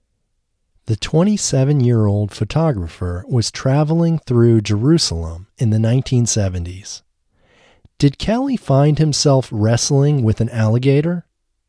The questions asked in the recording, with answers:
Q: Did Kelly find himself wrestling with an alligator?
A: No, Kelly didn't find himself wrestling with an alligator.